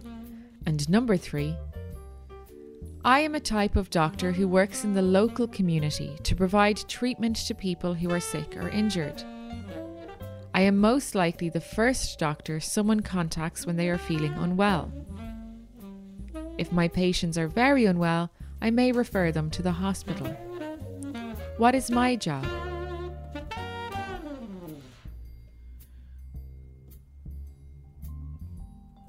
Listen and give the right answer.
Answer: I'm a GP or general practitioner.